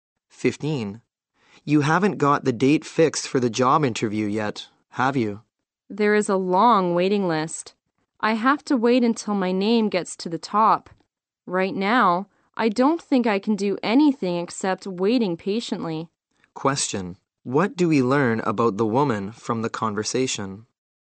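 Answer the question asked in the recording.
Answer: She is on a waiting list for a job interview and has to wait.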